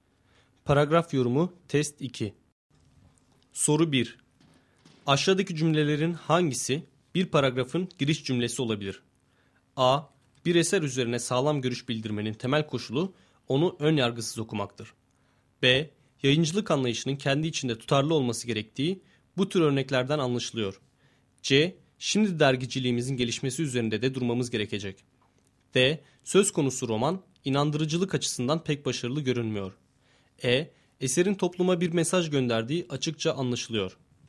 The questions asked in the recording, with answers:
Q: Aşağıdaki cümlelerin hangisi bir paragrafın giriş cümlesi olabilir?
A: Doğru cevap A şıkkı.